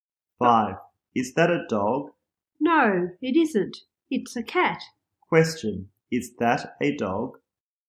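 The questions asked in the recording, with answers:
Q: Is that a dog?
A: No, it isn't. It's a cat.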